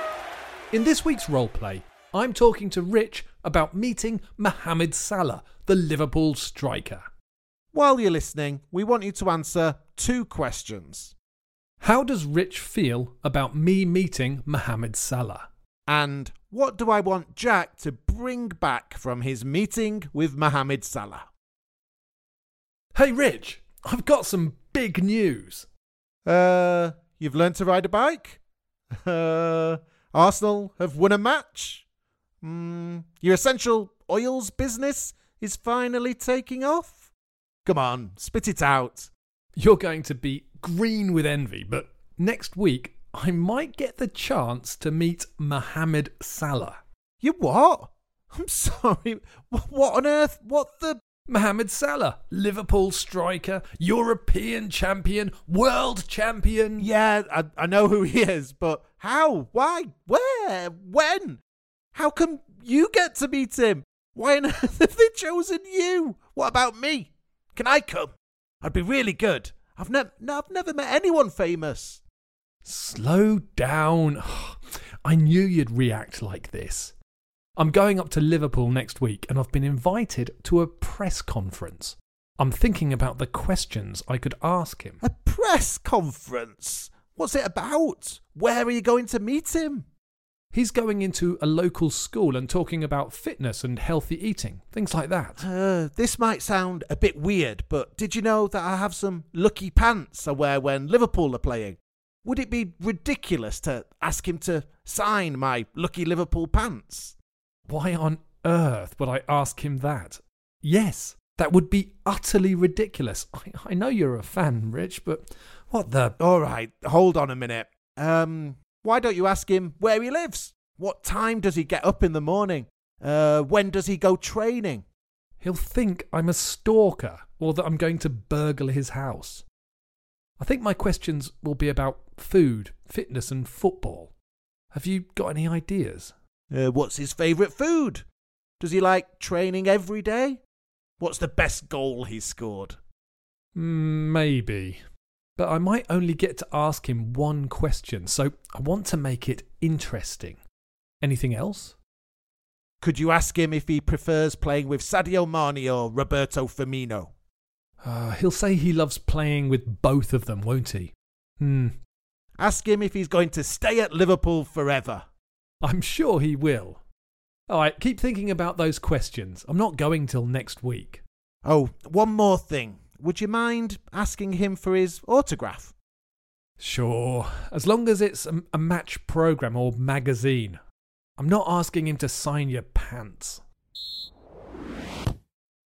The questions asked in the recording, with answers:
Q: How does Rich feel about me meeting Mohamed Salah?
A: I think the word is jealous.

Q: And what do I want Jack to bring back from his meeting with Mohamed Salah?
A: The answer was an autograph.